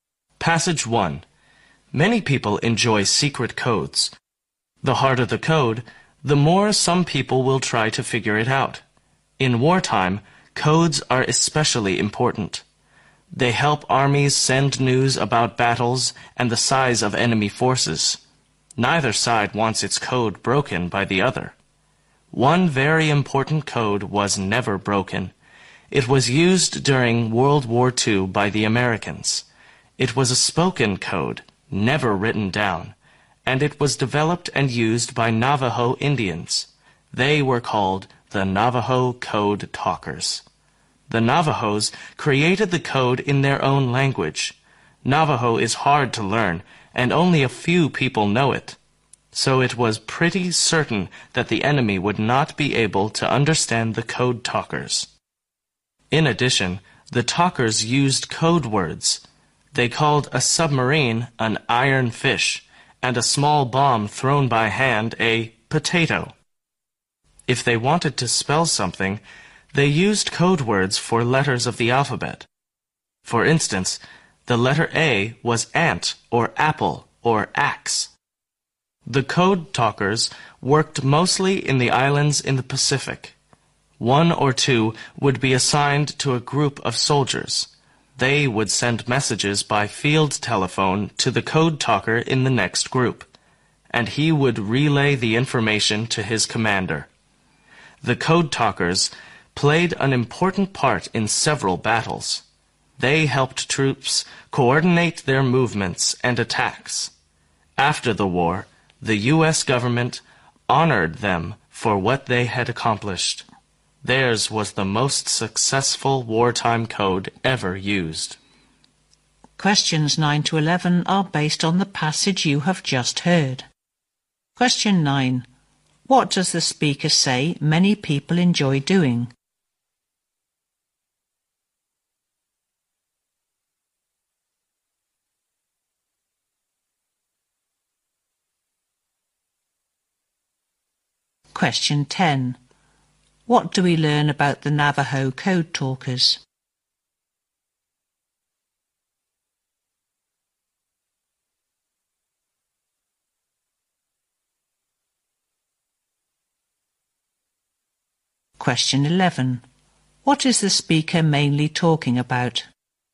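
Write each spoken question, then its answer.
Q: What does the speaker say many people enjoy doing?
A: Figuring out secret codes

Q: What is the speaker mainly talking about?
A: The Navajo code used in World War II, the most successful wartime code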